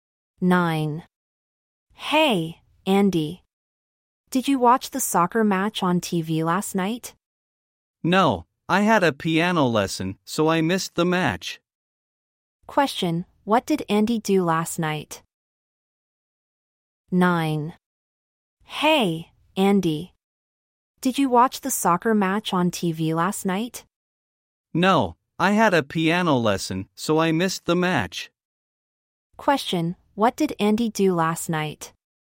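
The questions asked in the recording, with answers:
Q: what did Andy do last night?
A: He had a piano lesson.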